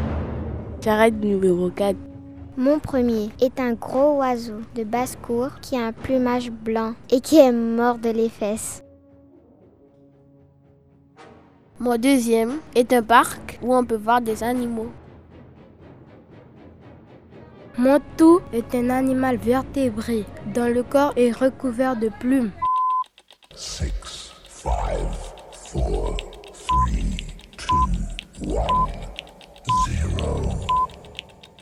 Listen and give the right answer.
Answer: un oiseau.